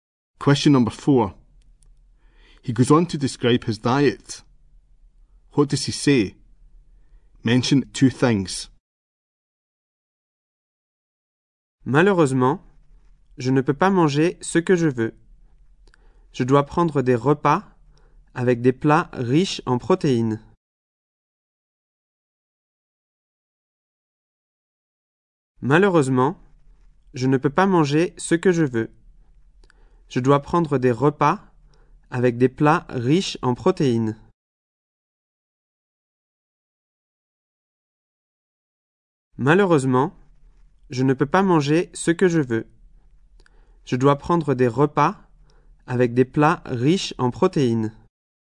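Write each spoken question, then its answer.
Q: What does he say? Mention 2 things.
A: He can't eat what he wants; he must eat meals rich in protein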